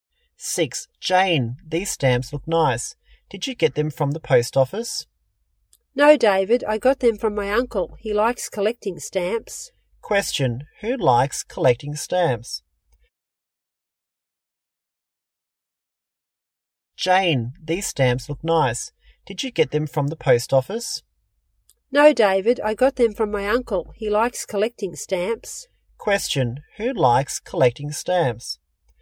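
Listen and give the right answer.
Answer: Jane's uncle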